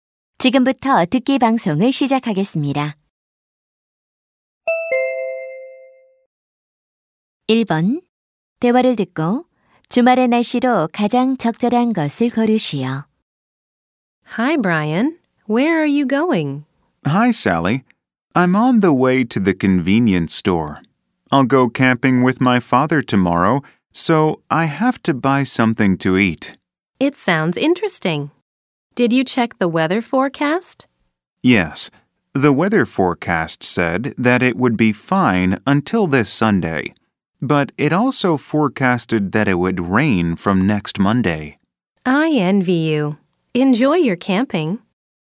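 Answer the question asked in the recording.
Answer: 맑음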